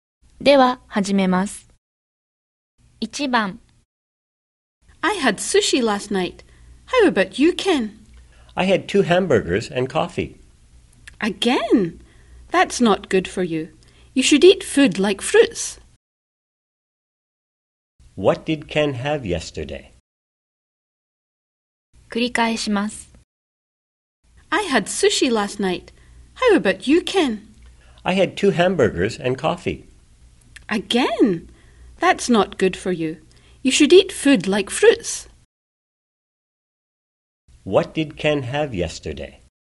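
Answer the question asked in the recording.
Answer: Two hamburgers and coffee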